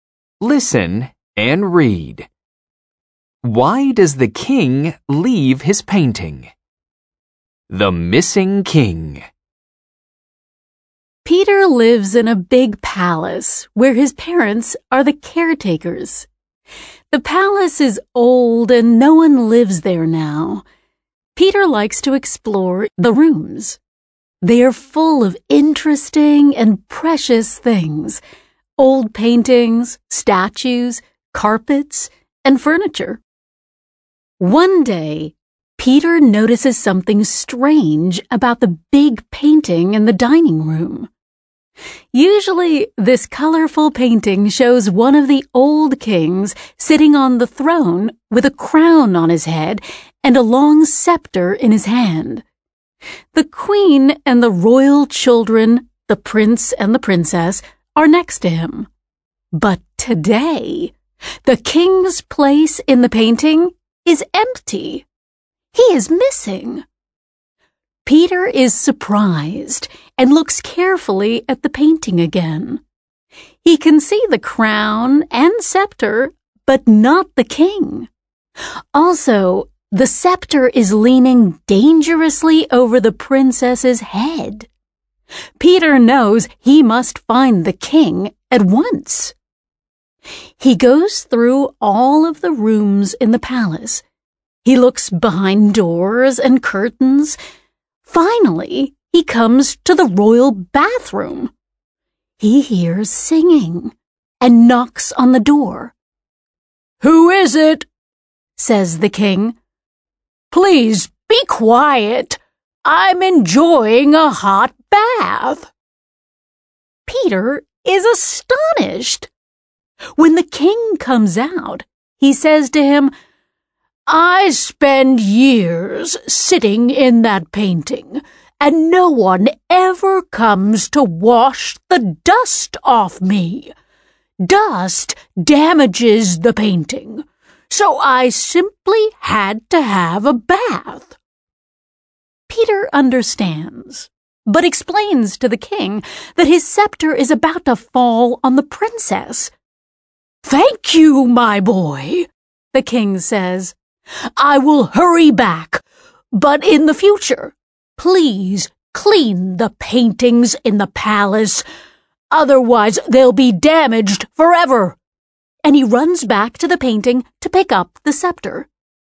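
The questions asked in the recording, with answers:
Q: Why does the king leave his painting?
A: To have a bath, because no one washes the dust off him and dust damages the painting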